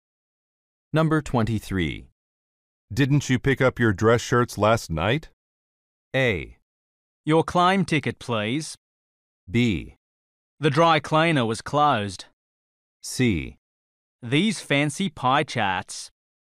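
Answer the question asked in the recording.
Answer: B: The dry cleaner was closed.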